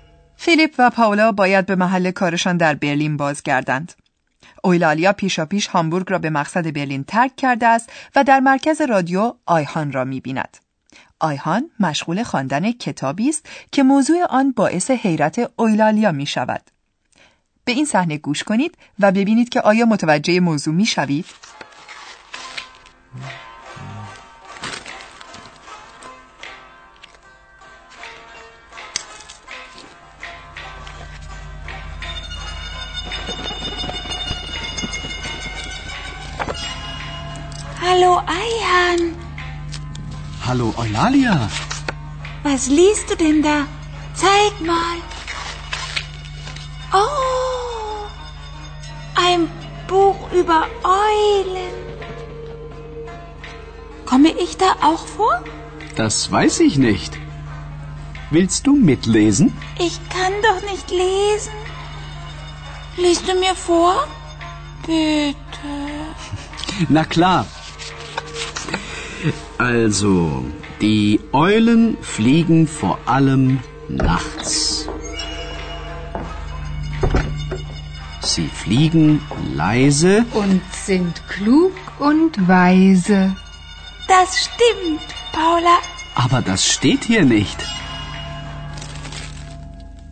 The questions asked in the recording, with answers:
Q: به این صحنه گوش کنید و ببینید که آیا متوجه موضوع می شوید؟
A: آیخان سرگرم خواندن کتابی است.